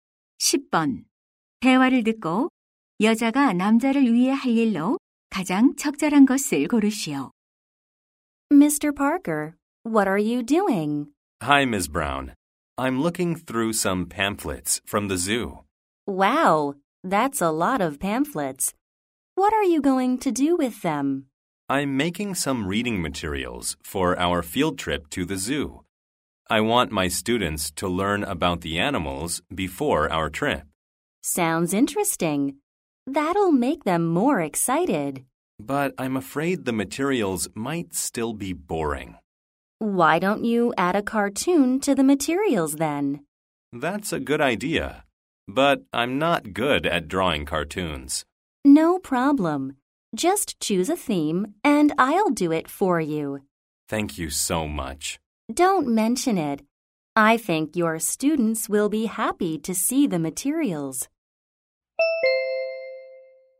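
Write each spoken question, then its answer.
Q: 대화를 듣고 여자가 남자를 위해 할 일로 가장 적절한 것을 고르시오.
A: 자료에 넣을 만화 그리기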